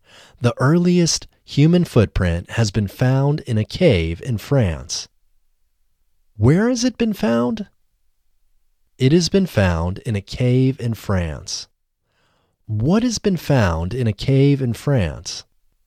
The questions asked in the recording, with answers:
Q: What has been found in a cave in France?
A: The earliest human footprint has been found in a cave in France.